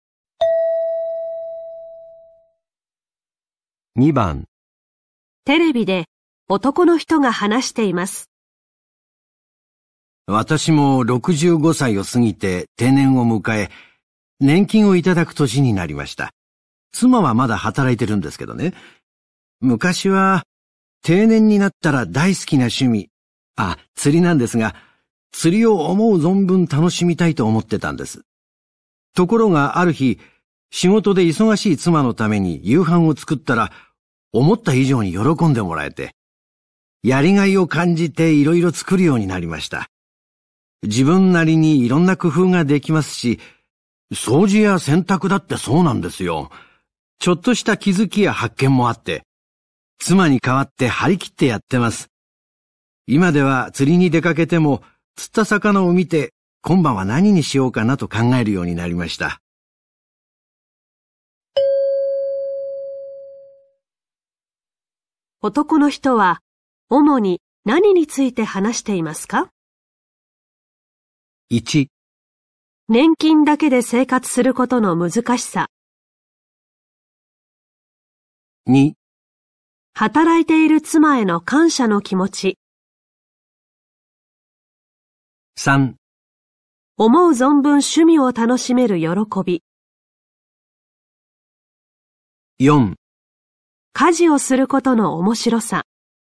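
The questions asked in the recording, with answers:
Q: 男の人は主に何について話していますか?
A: 4: 家事をすることの面白さ。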